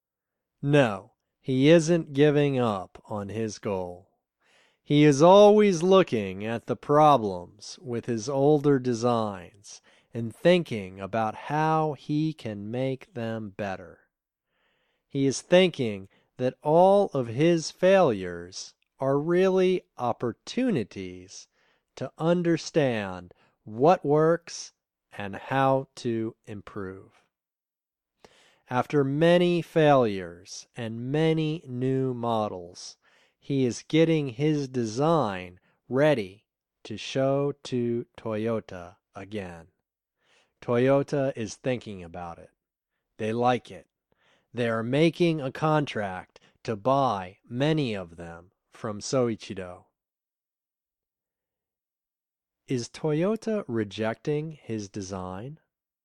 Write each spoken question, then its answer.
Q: Is Toyota rejecting his design?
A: No, Toyota isn't rejecting his design.